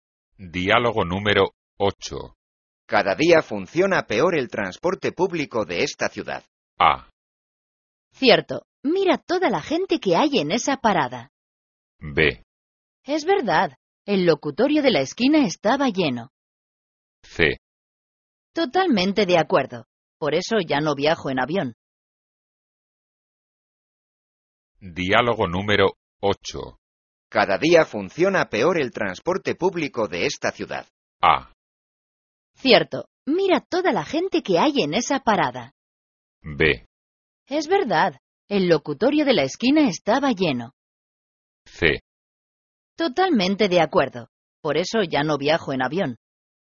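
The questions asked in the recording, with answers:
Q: Cada día funciona peor el transporte público de esta ciudad.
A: A: Cierto. Mira toda la gente que hay en esa parada.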